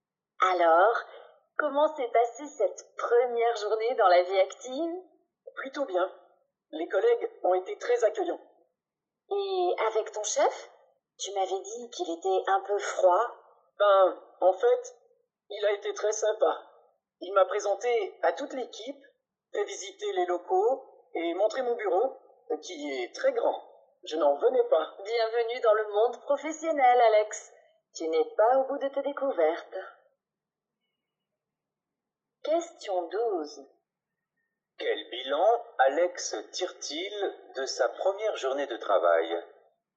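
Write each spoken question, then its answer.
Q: Quel bilan Alex tire-t-il de sa première journée de travail ?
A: Un bilan positif : ça s'est plutôt bien passé, ses collègues et son chef ont été accueillants.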